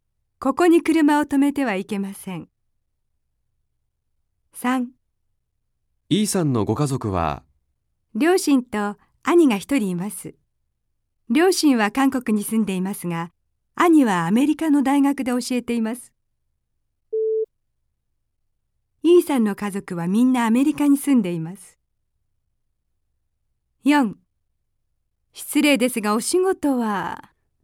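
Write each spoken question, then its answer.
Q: E さんの家族はみんなアメリカに住んでいます。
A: 正しくない(×)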